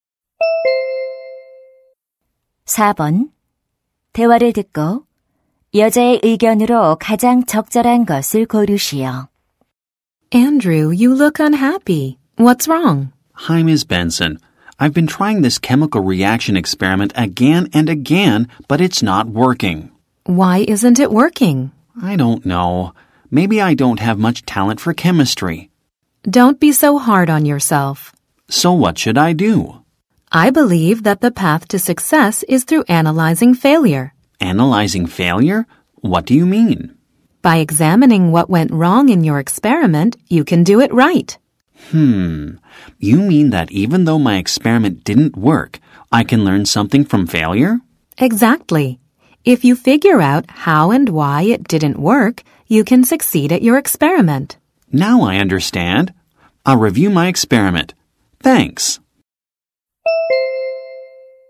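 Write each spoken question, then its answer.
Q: 대화를 듣고 여자의 의견으로 가장 적절한 것을 고르시오.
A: 실패를 분석하는 것이 성공으로 가는 길이다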